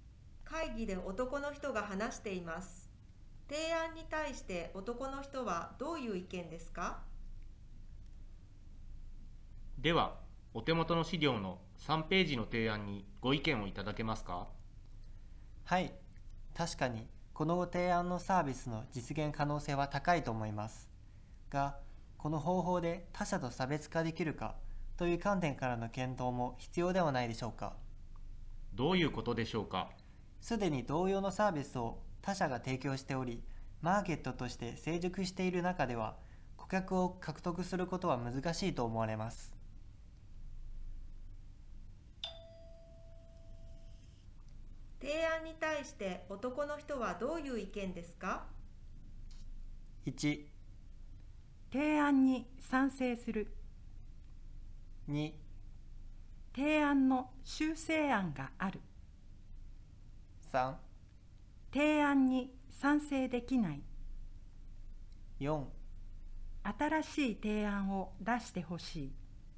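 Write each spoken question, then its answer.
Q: 提案に対して男の人はどういう意見ですか?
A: 3: 提案に賛成できない。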